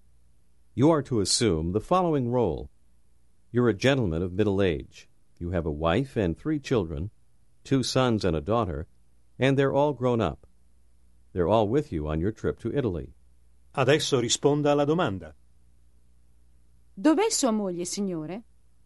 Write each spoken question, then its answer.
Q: Dov'è sua moglie, signore?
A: È qui. Mia moglie è qui in Italia con me.